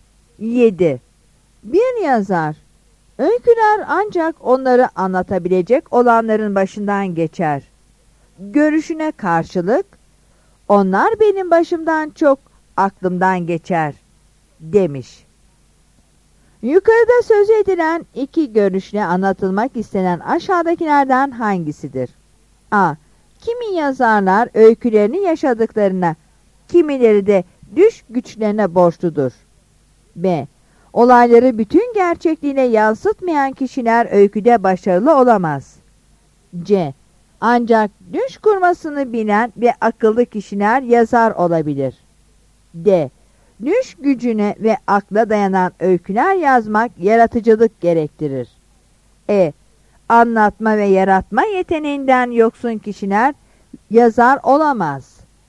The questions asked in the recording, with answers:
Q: Yukarıda söz edilen iki görüşle anlatılmak istenen aşağıdakilerden hangisidir?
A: Yanıt A'dır.